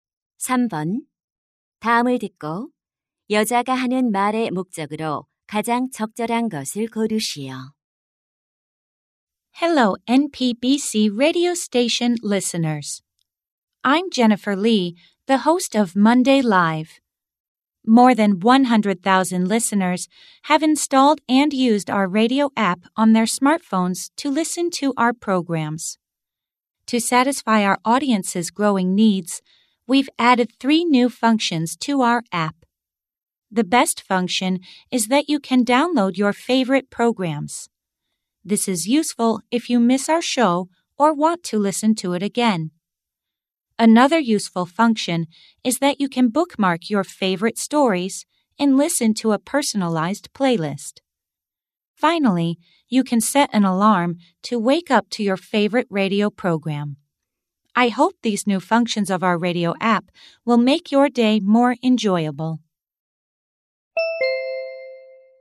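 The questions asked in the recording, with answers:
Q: 다음을 듣고 여자가 하는 말의 목적으로 가장 적절한 것을 고르시오.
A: 라디오 앱의 새로운 기능을 소개하려고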